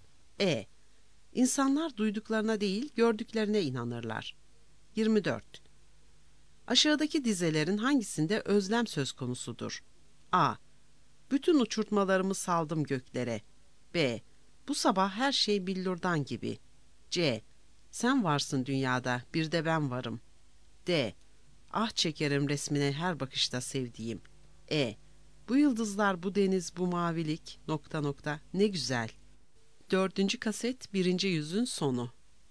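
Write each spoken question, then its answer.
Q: Aşağıdaki dizelerin hangisinde özlem söz konusudur?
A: D: Ah çekerim resmine her bakışta sevdiğim.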